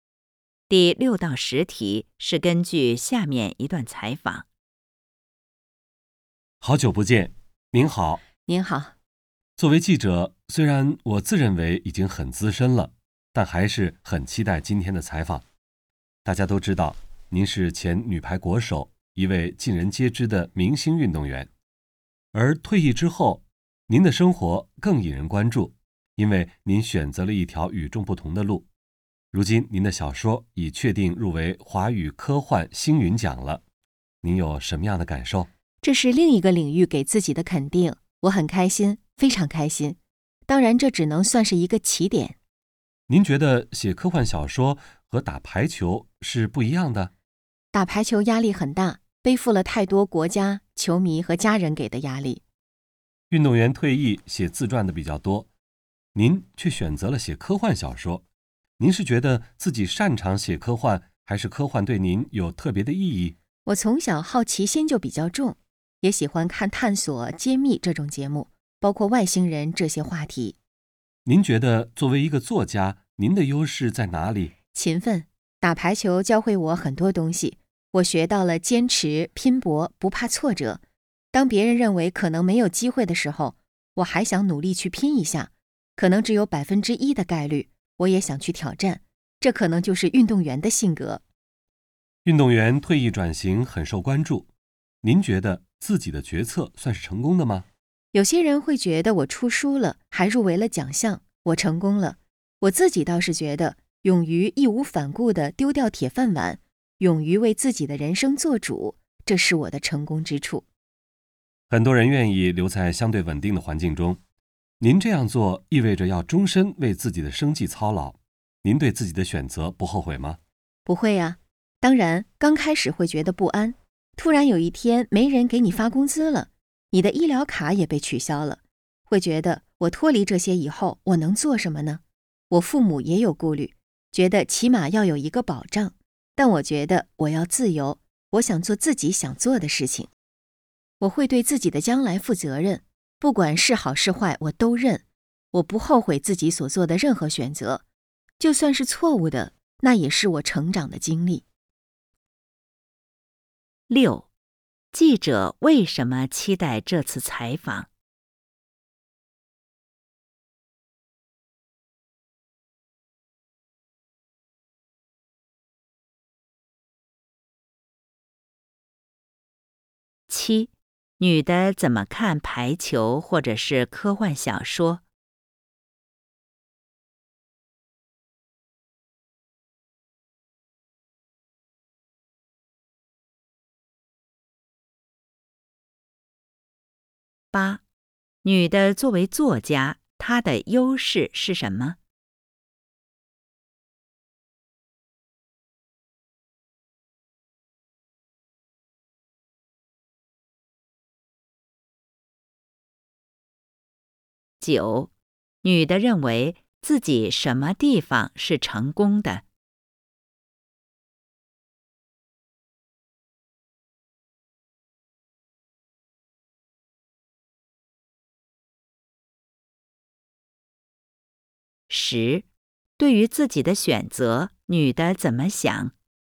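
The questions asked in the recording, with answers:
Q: 女的作为作家,她的优势是什么?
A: 勤奋

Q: 女的认为自己什么地方是成功的?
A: 勇于丢掉铁饭碗,为自己的人生做主

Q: 对于自己的选择,女的怎么想?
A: 不后悔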